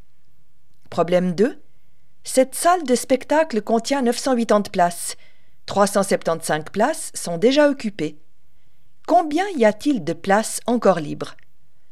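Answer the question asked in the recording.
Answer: 605 places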